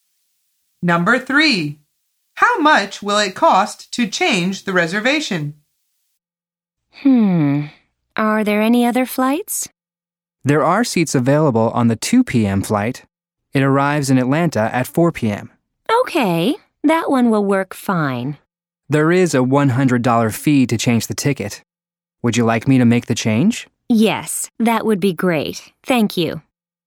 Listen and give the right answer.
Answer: The answer is $100.